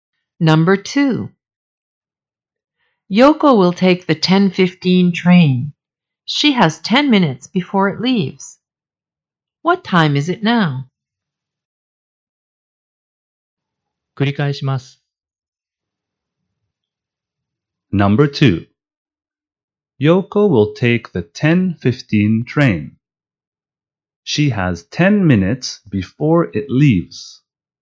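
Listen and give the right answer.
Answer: 10:05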